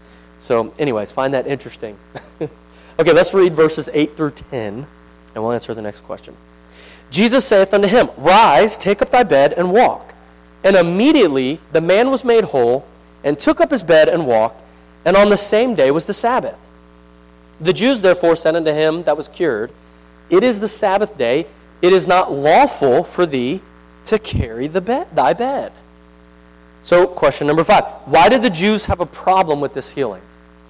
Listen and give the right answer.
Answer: Because it was the Sabbath, and he was carrying the bed.